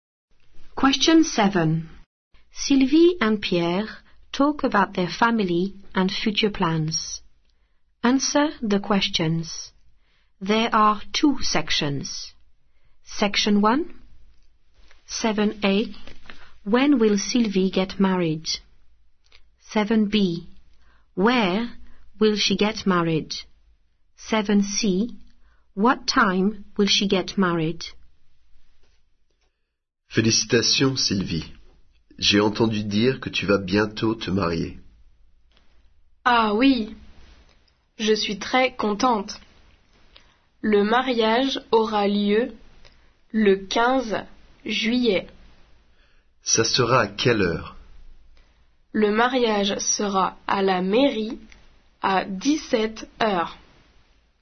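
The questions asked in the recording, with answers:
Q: When will Sylvie get married?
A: 15 July

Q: Where will she get married?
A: at the town hall

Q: What time will she get married?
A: 5 pm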